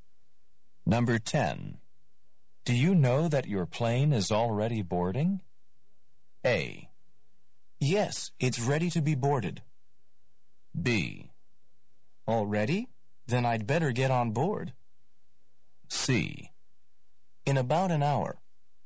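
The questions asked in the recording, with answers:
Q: Do you know that your plane is already boarding?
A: B: Already? Then I'd better get on board.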